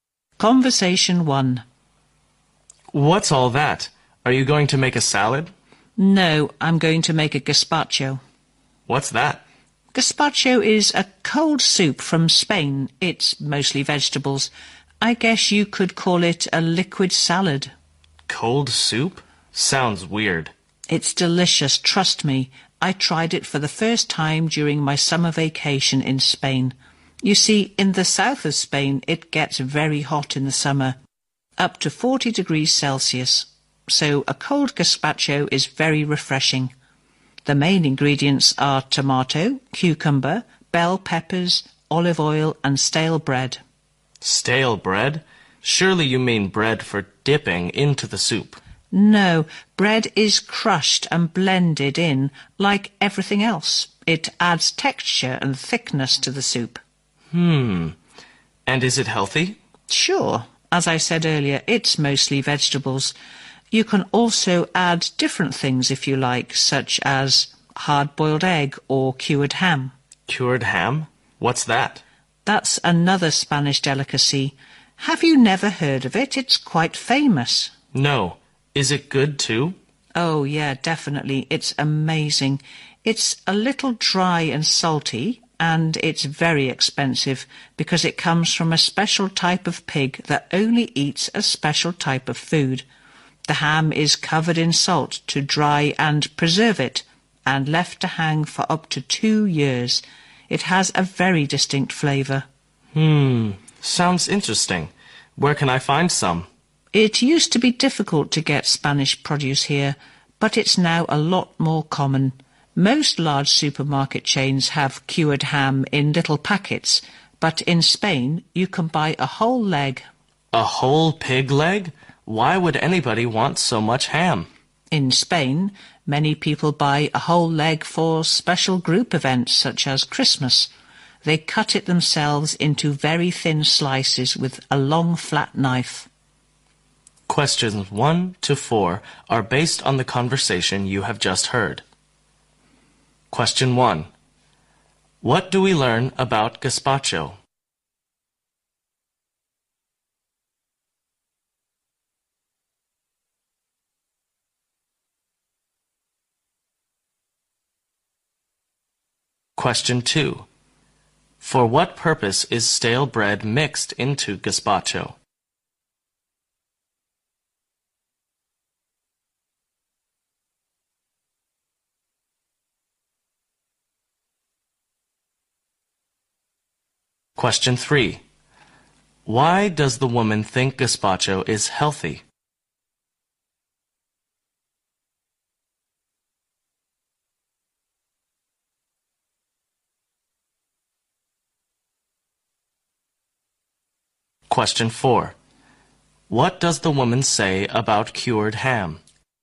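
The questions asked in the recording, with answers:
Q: For what purpose is stale bread mixed into gazpacho?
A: To add texture and thickness

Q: Why does the woman think gazpacho is healthy?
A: It is mostly vegetables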